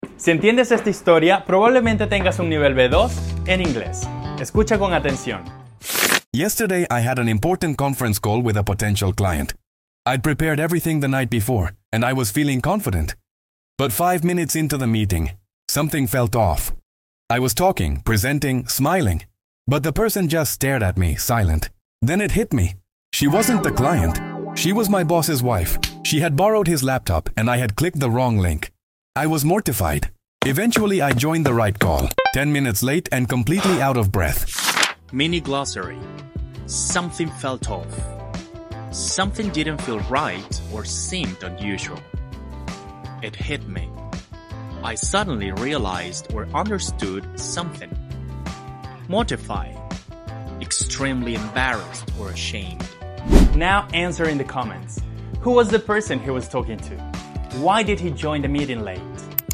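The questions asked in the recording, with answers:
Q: Who was the person he was talking to?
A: His boss's wife

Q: Why did he join the meeting late?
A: He had clicked the wrong link and joined the wrong call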